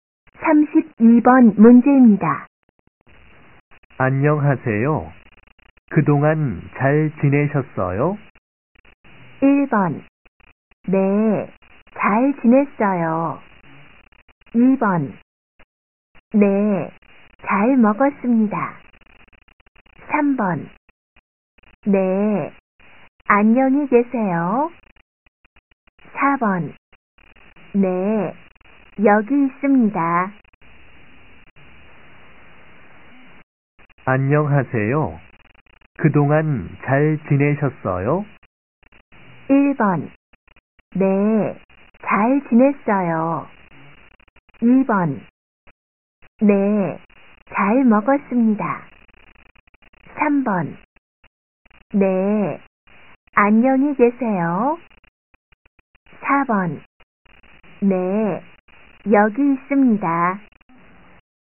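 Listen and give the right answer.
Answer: 1: 네, 잘 지냈어요.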